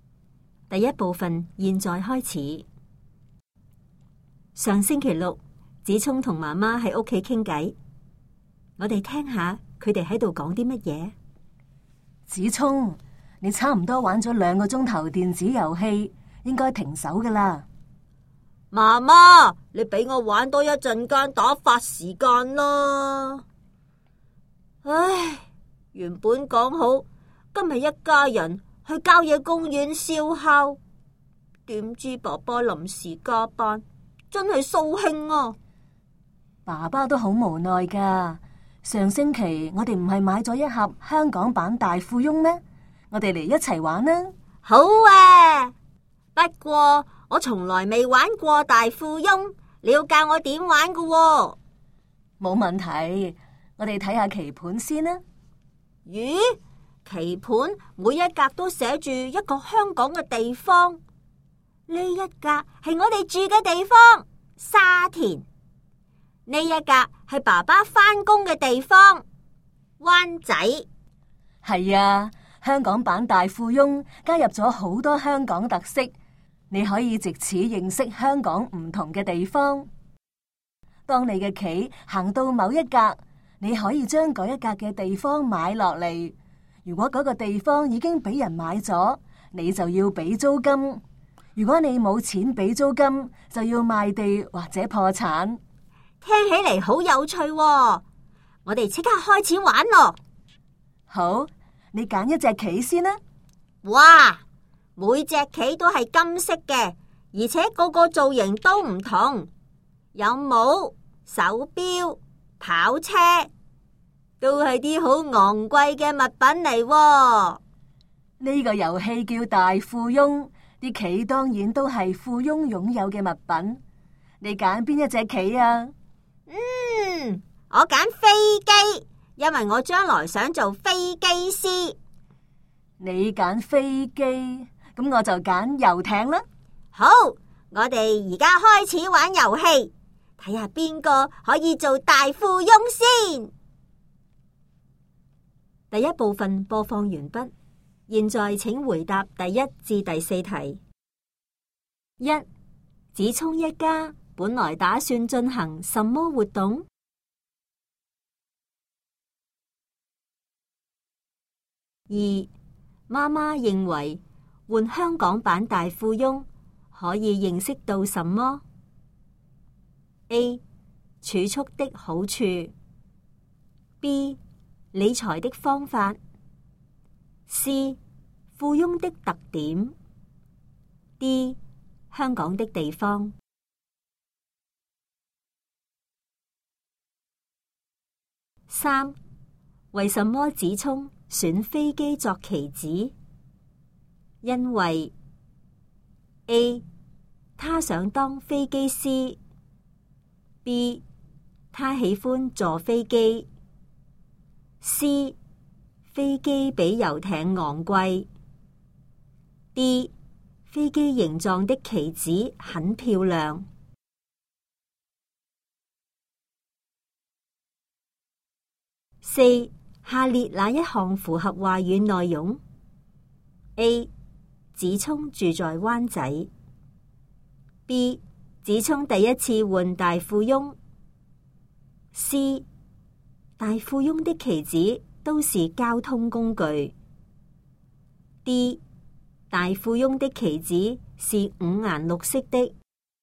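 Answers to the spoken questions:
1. 去郊野公园烧烤
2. D: 香港的地方
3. A: 他想当飞机师
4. B: 子聪第一次换大富翁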